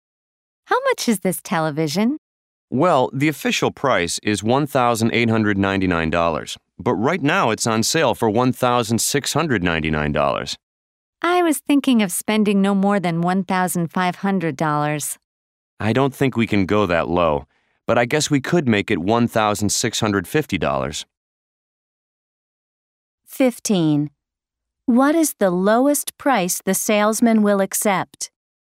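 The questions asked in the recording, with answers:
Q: What is the lowest price the salesman will accept?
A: $1,650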